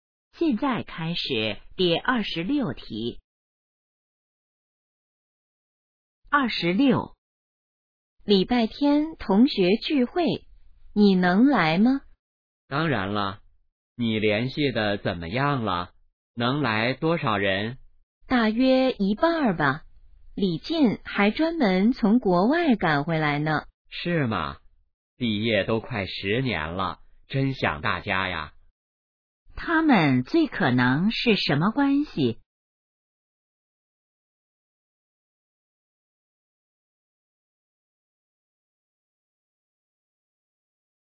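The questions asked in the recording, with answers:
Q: 他们最可能是什么关系?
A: 同学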